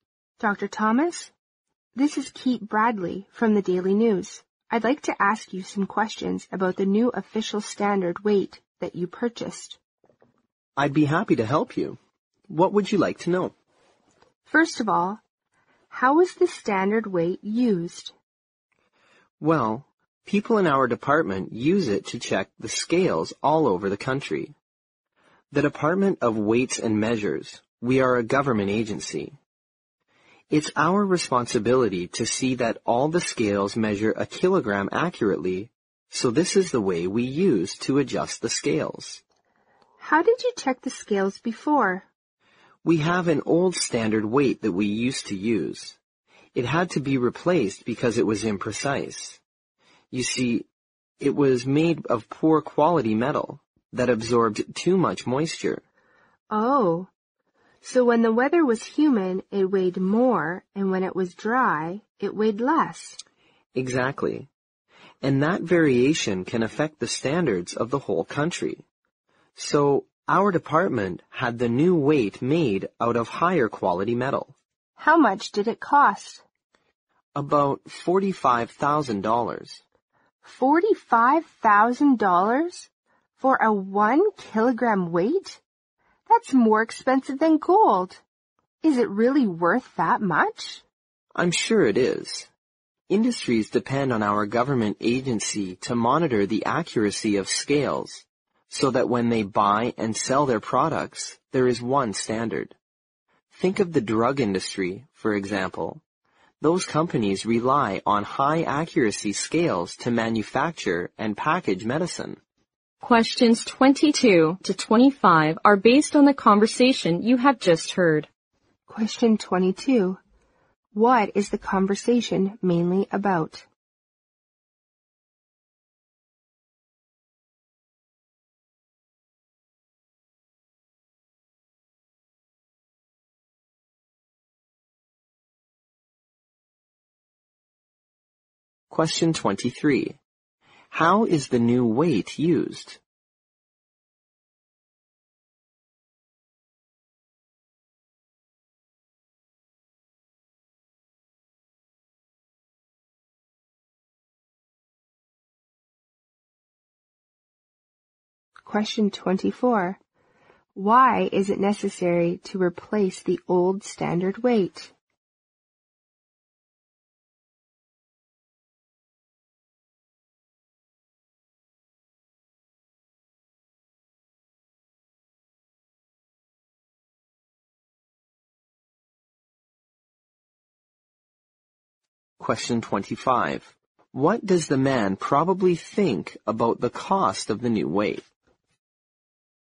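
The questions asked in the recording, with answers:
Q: What is the conversation mainly about?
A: A new official standard weight

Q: How is the new weight used?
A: To check the accuracy of scales all over the country

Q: Why is it necessary to replace the old standard weight?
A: It was imprecise because its poor quality metal absorbed moisture

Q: What does the man probably think about the cost of the new weight?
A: It is worth the money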